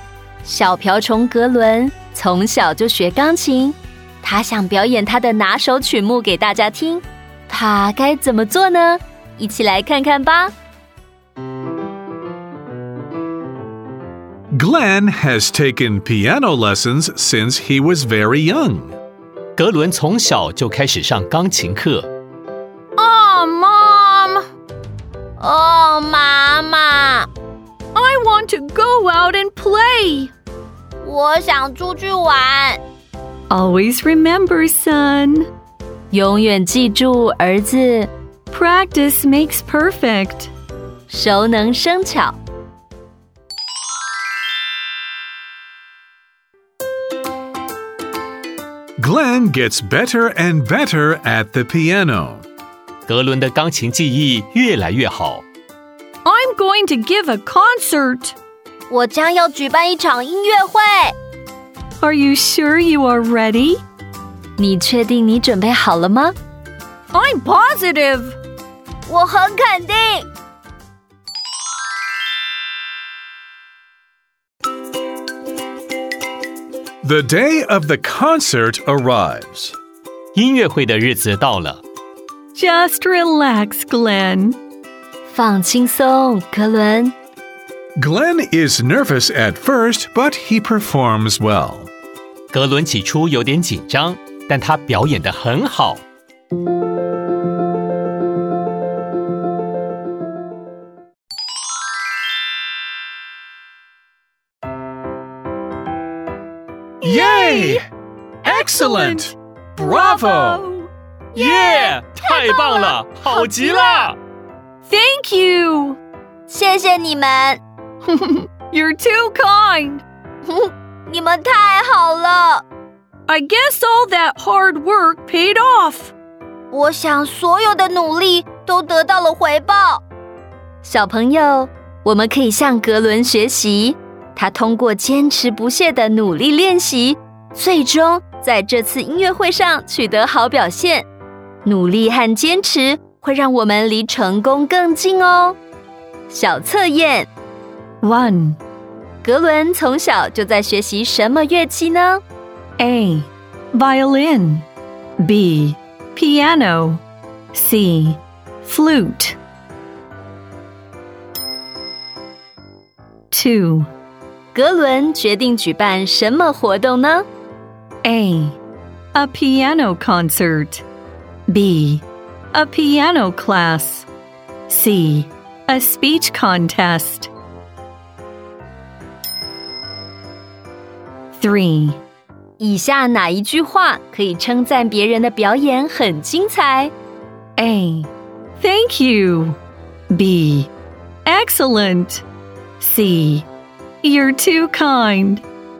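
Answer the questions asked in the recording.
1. B: Piano
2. A: A piano concert.
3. B: Excellent.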